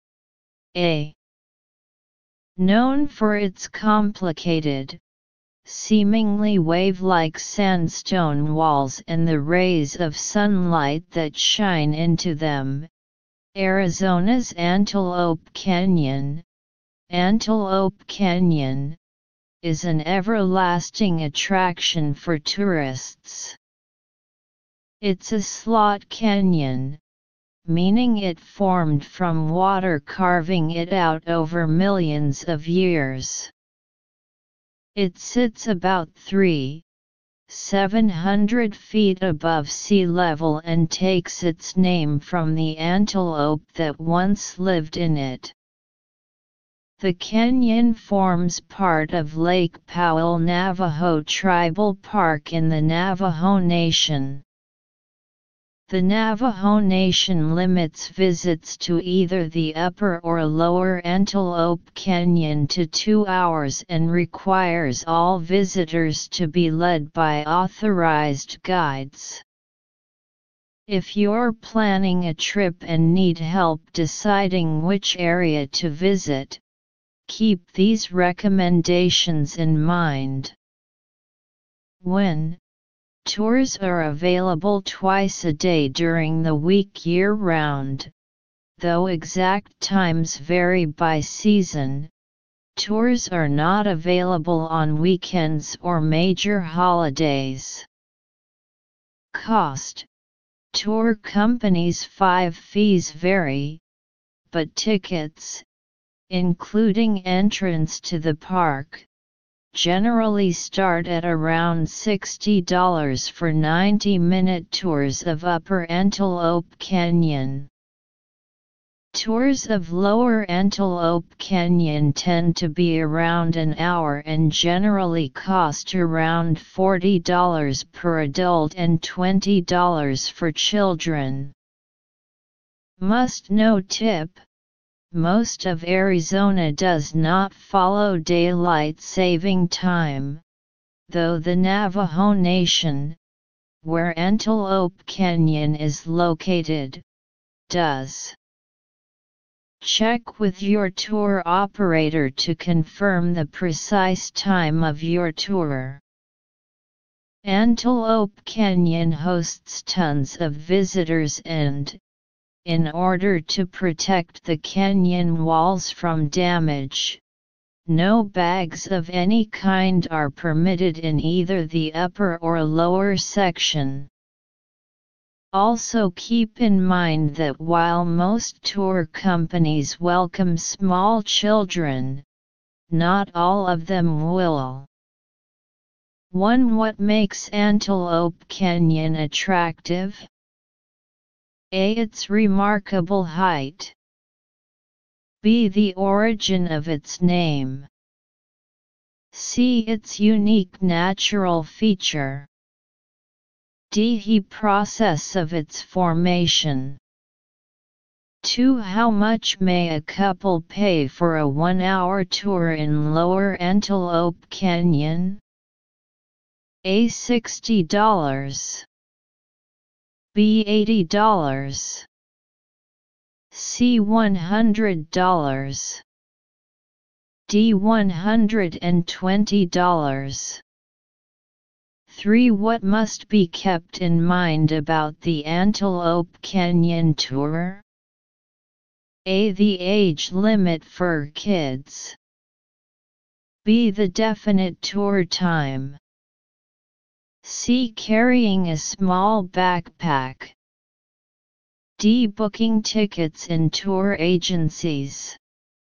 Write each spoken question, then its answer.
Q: What makes Antelope Canyon attractive?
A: Answer 1. C.

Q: How much may a couple pay for a 1-hour tour in Lower Antelope Canyon?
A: 2. B.

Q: What must be kept in mind about the Antelope Canyon tour?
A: 3. B.